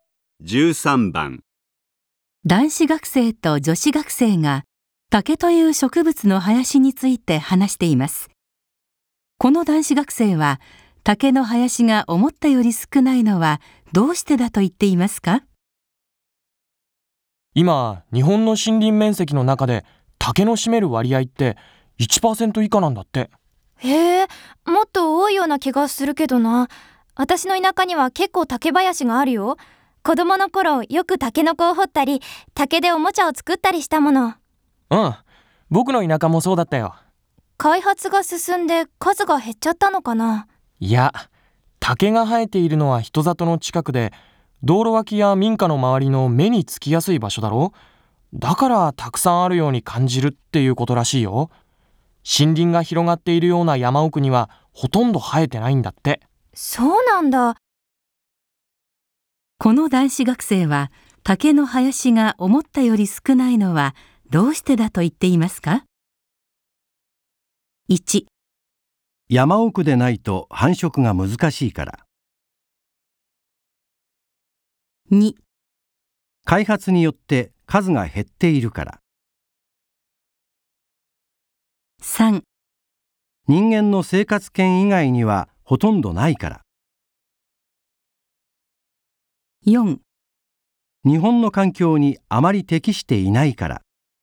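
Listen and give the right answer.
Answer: 3: 人間の生活圏以外にはほとんどないから。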